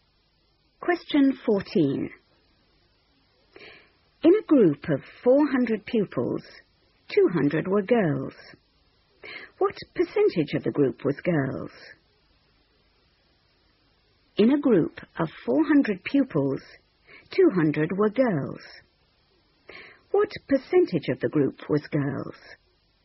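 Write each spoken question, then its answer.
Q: What percentage of the group was girls?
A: 50%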